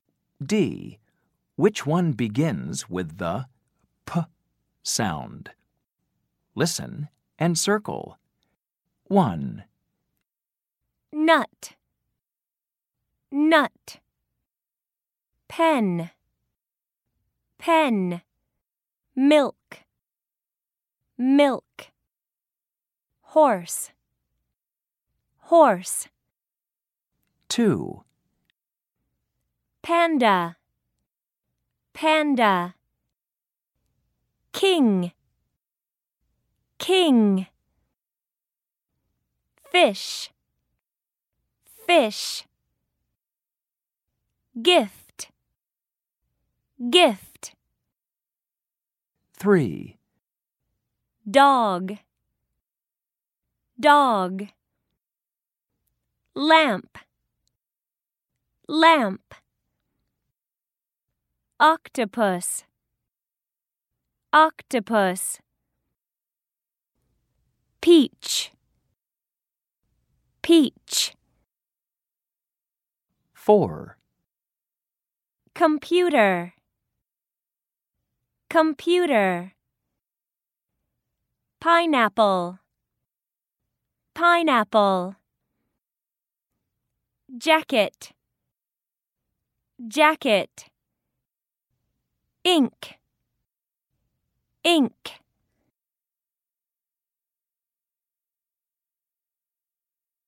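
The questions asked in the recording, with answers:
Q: Which one begins with the P sound?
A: Pen

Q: Which one begins with the P sound?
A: Panda

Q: Which one begins with the P sound?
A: Peach

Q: Which one begins with the P sound?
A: Pineapple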